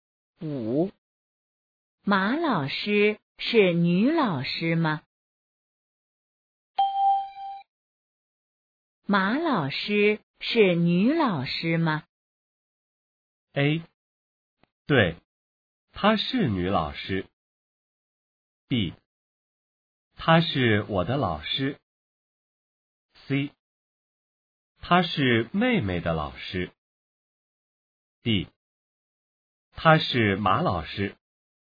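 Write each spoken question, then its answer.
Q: 马老师是女老师吗?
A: A: 对,她是女老师。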